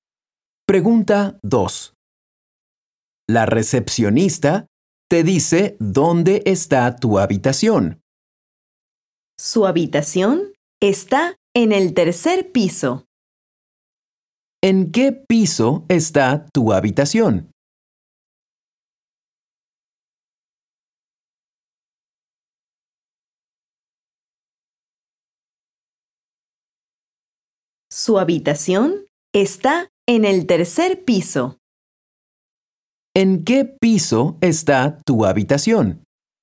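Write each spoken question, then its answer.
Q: ¿En qué piso está tu habitación?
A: en el tercer piso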